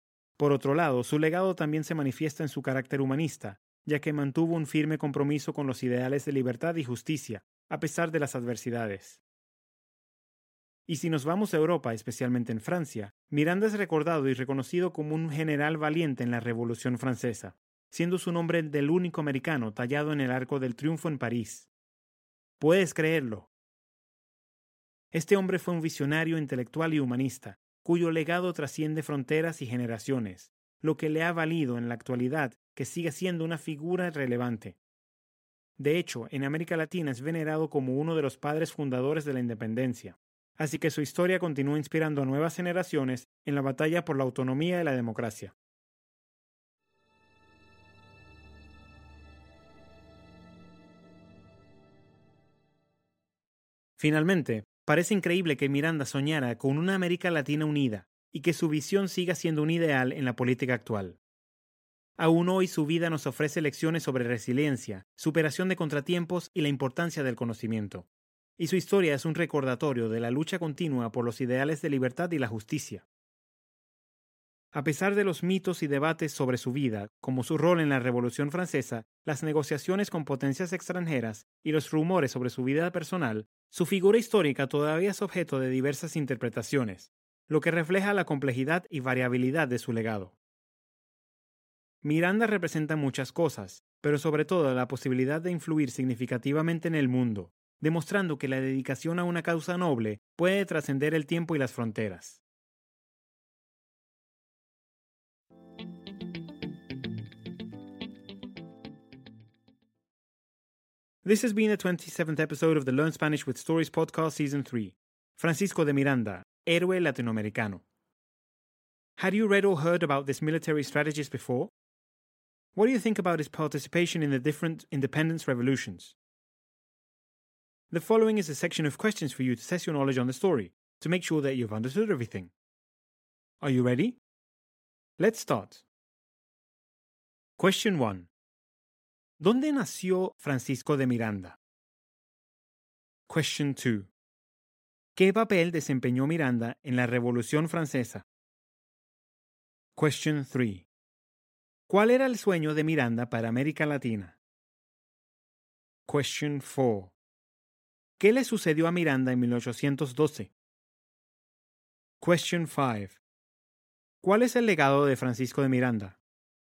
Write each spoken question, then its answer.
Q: ¿Qué papel desempeñó Miranda en la Revolución Francesa?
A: Fue general de los ejércitos de la República Francesa.

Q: ¿Cuál era el sueño de Miranda para América Latina?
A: Soñaba con una América Latina libre y unida.

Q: ¿Cuál es el legado de Francisco de Miranda?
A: Su legado es un símbolo de perseverancia, visión intelectual y búsqueda incansable de la libertad.